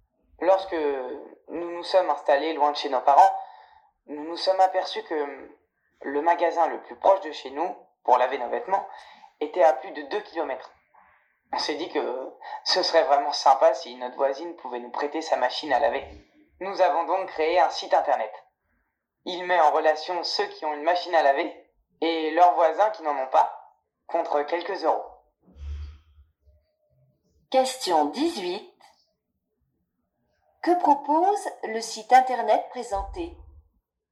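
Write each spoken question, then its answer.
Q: Que propose le site internet présenté ?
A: De mettre en relation ceux qui ont une machine à laver avec leurs voisins qui n'en ont pas, contre quelques euros.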